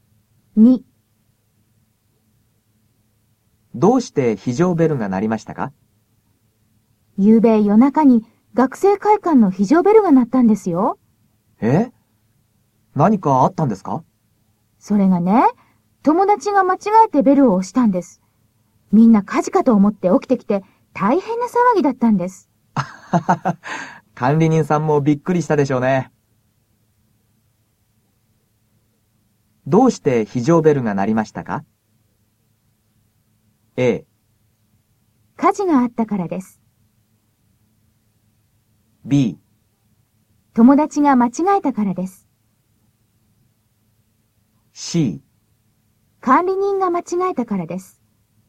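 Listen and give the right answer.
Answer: B: 友達が間違えたからです。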